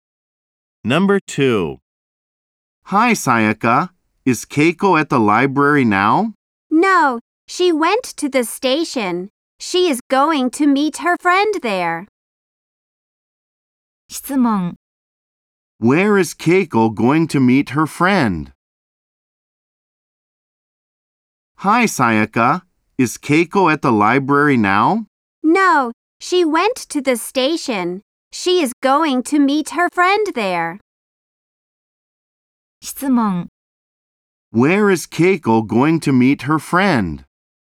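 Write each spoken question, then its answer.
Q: Where is Keiko going to meet her friend?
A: At the station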